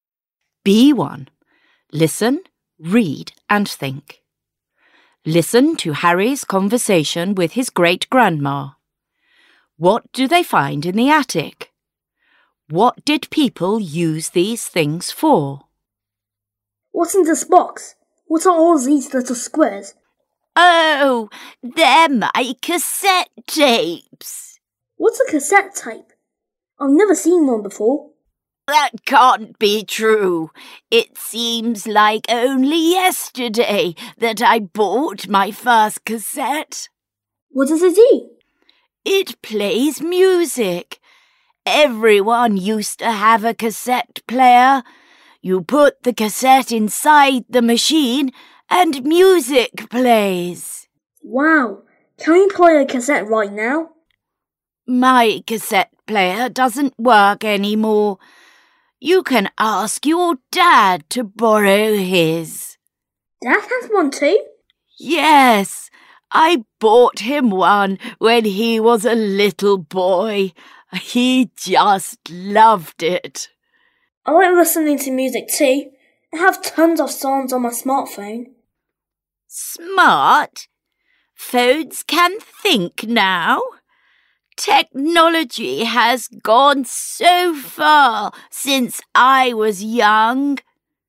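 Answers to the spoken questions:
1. Cassette tapes
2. To play music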